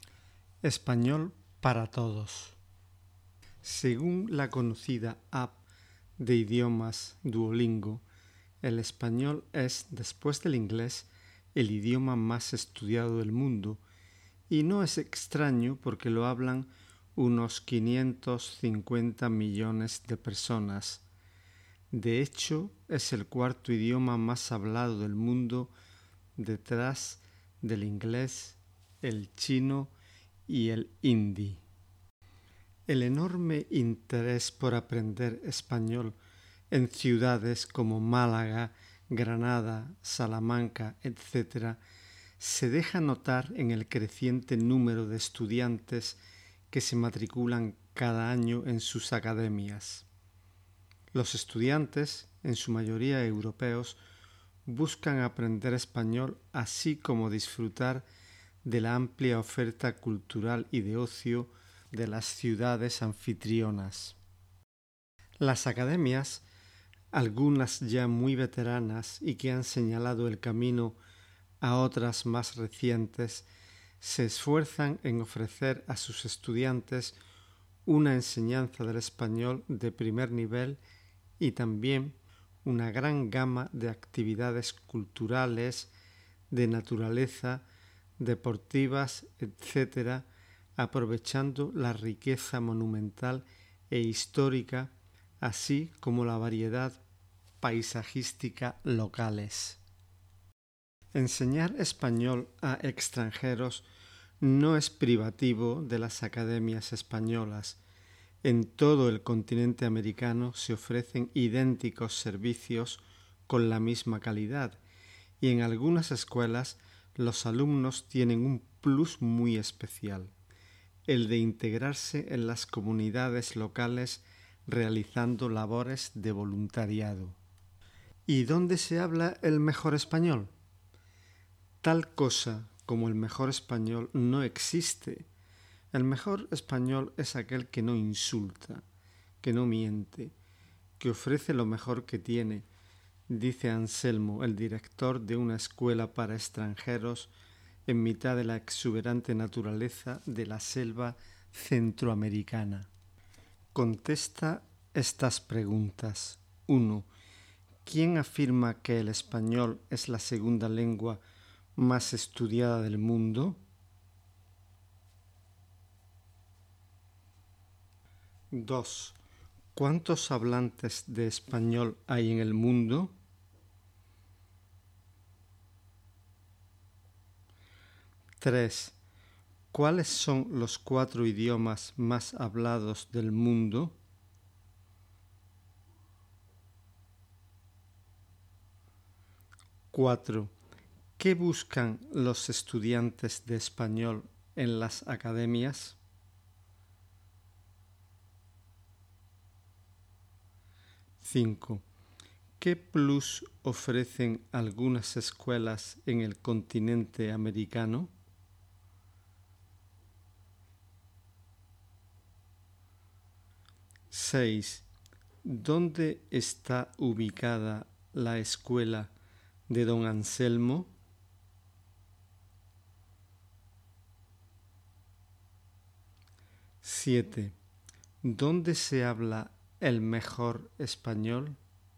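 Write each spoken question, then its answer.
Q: ¿Quién afirma que el español es la segunda lengua más estudiada del mundo?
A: La app de idiomas Duolingo

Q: ¿Cuántos hablantes de español hay en el mundo?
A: Unos 550 millones

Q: ¿Cuáles son los cuatro idiomas más hablados del mundo?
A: El inglés, el chino, el hindi y el español

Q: ¿Qué buscan los estudiantes de español en las academias?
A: Aprender español y disfrutar de la oferta cultural y de ocio de las ciudades

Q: ¿Qué plus ofrecen algunas escuelas en el continente americano?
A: Integrarse en las comunidades locales haciendo voluntariado

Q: ¿Dónde está ubicada la escuela de don Anselmo?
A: En la selva centroamericana

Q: ¿Dónde se habla el mejor español?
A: En ningún sitio: el mejor español no existe; es el que no insulta, no miente y ofrece lo mejor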